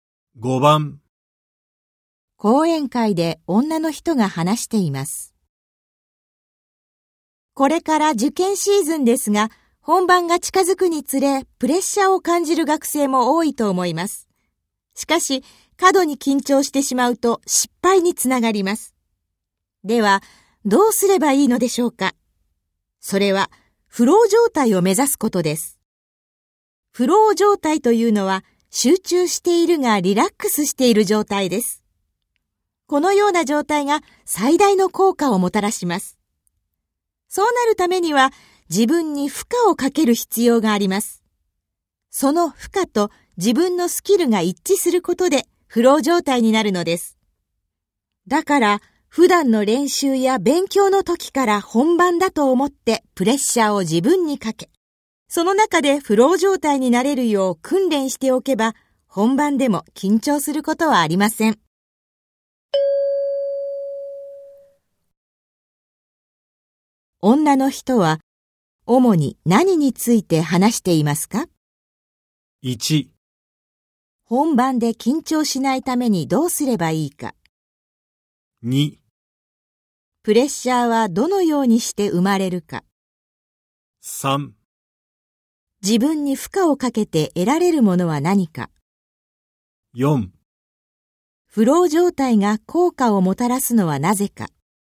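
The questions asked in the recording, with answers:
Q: 女の人は主に何について話していますか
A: 1: 本番で緊張しないためにどうすればいいか。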